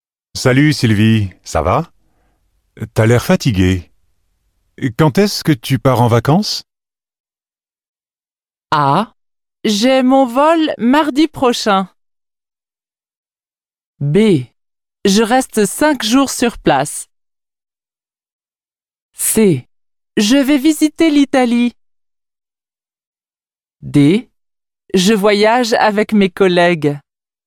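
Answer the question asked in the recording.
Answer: A: J'ai mon vol mardi prochain.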